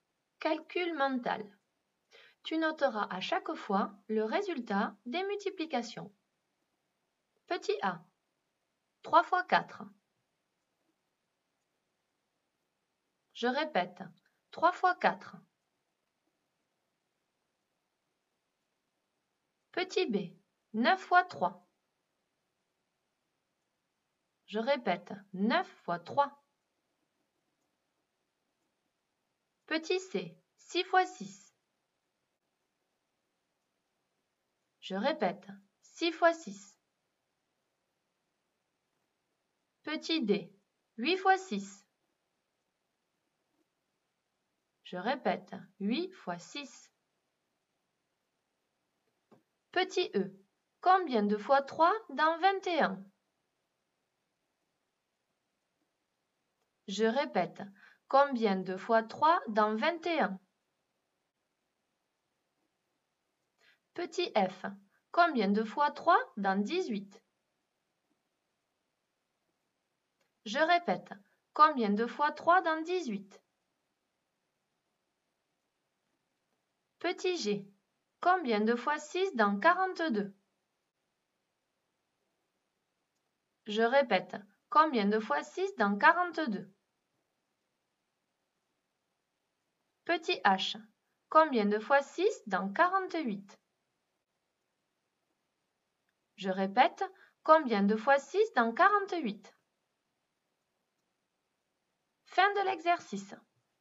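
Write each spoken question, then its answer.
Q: 3 fois 4.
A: 12

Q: 9 fois 3.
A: 27

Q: 6 fois 6.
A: 36

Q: 8 fois 6.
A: 48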